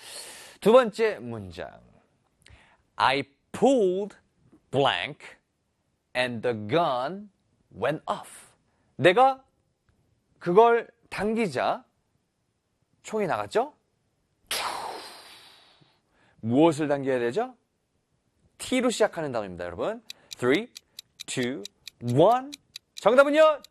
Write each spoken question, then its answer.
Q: I pulled blank and the gun went off.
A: Trigger!